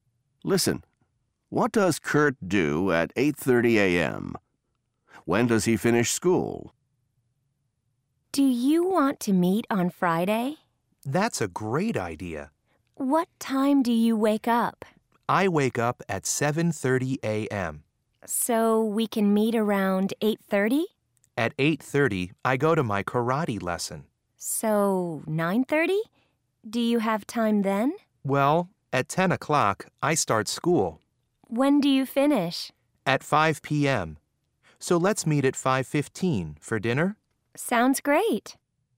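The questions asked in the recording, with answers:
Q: What does Kurt do at 8:30 a.m.?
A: He goes to his karate lesson.

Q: When does he finish school?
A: At 5 p.m.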